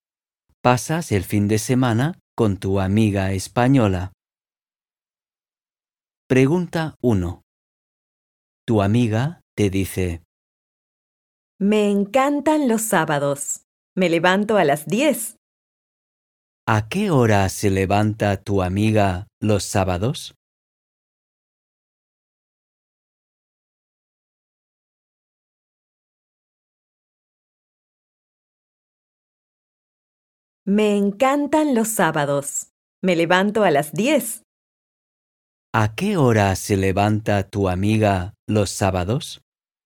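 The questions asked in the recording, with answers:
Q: ¿A qué hora se levanta tu amiga los sábados?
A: A las 10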